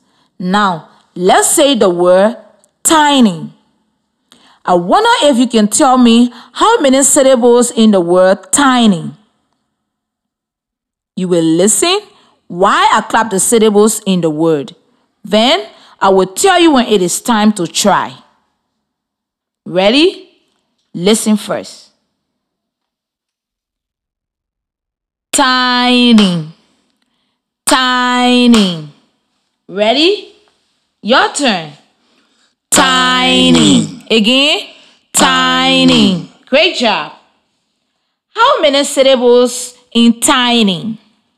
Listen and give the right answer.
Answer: Yes, there are two syllables.